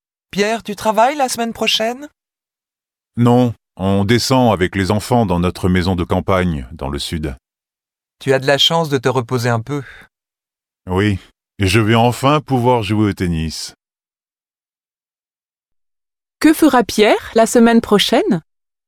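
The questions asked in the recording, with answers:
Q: Que fera Pierre la semaine prochaine ?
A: Il partira avec ses enfants dans sa maison de campagne dans le sud, se reposer et jouer au tennis.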